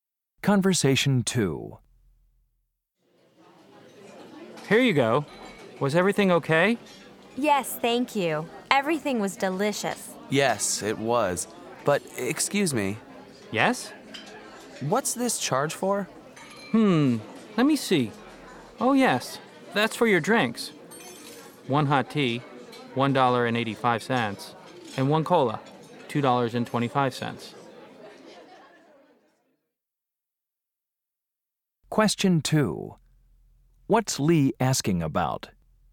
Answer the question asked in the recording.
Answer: Oh, I see. Thanks for explaining the bill.